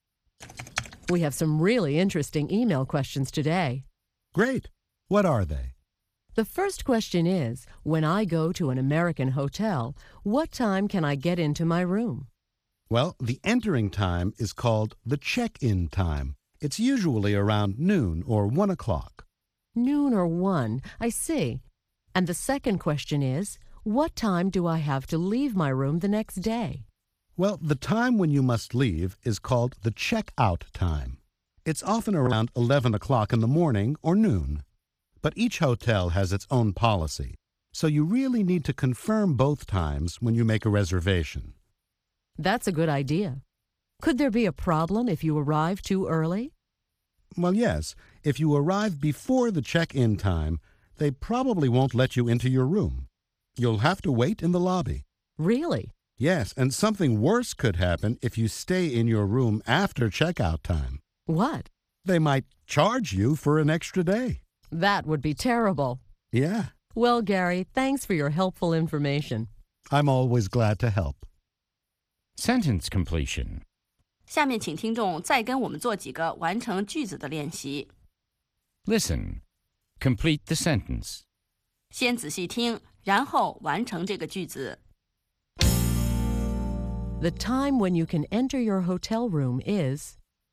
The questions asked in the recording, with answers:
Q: The time when you can enter your hotel room is...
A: The check-in time. The entering time is called the check-in time.